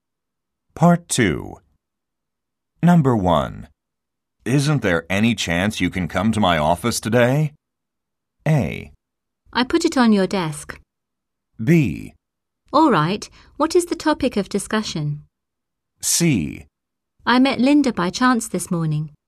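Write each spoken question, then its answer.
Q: Isn't there any chance you can come to my office today?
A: B: All right, what is the topic of discussion?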